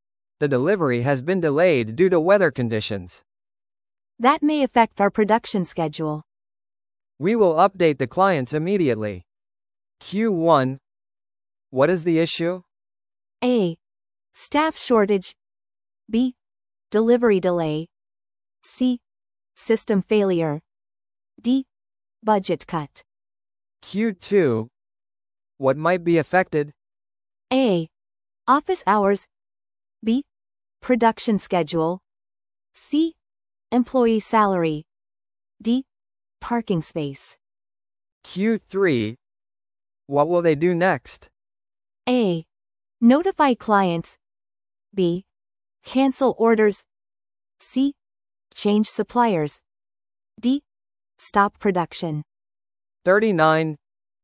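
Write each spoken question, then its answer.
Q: What is the issue?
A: B: Delivery delay.

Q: What might be affected?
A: B: Production schedule.

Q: What will they do next?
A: A: Notify clients.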